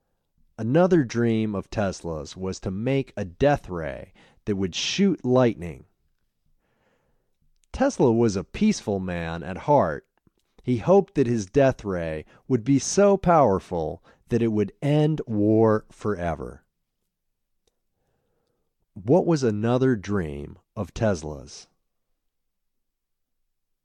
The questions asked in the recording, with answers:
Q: What was another dream of Tesla's?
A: Another dream of Tesla's was to make a death ray that would shoot lightning.